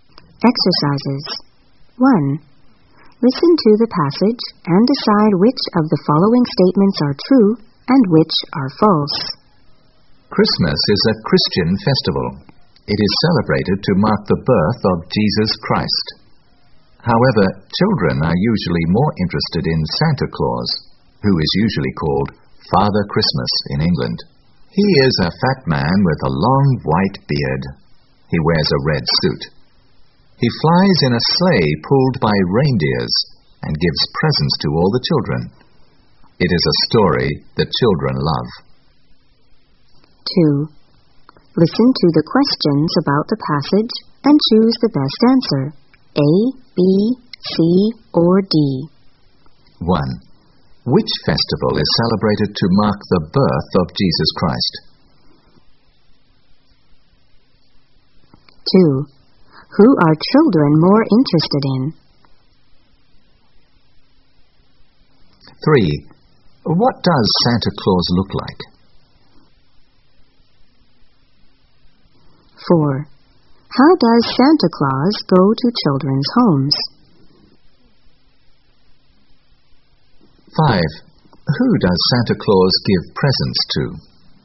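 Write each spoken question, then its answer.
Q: Which festival is celebrated to mark the birth of Jesus Christ?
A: Christmas

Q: Who are children more interested in?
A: Santa Claus

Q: What does Santa Claus look like?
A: A fat man with a long white beard, wearing a red suit

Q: How does Santa Claus go to children's homes?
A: He flies in a sleigh pulled by reindeers

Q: Who does Santa Claus give presents to?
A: All the children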